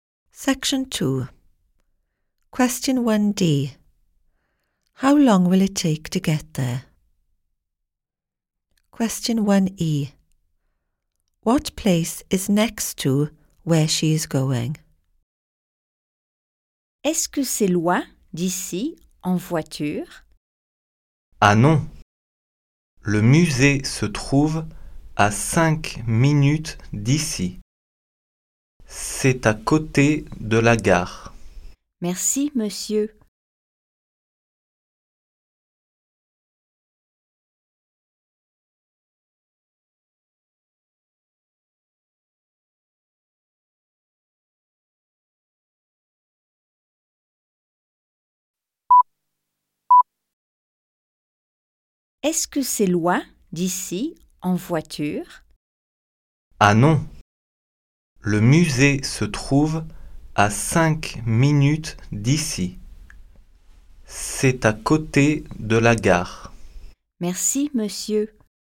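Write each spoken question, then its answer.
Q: How long will it take to get there?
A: 5 minutes

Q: What place is next to where she is going?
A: The station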